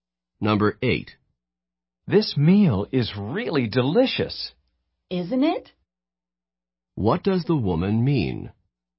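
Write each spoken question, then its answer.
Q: What does the woman mean?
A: She agrees that the meal is delicious.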